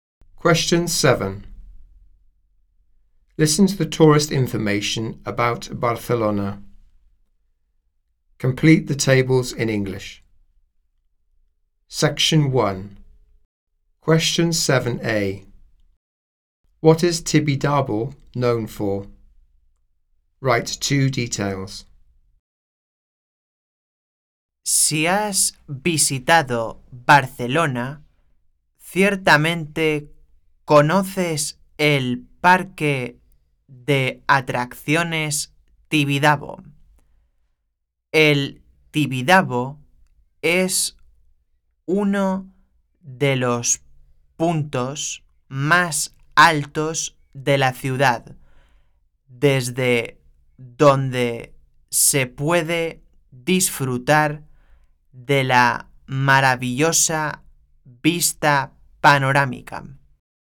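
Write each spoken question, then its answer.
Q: What is Tibidabo known for?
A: Amusement park; one of the highest points with panoramic views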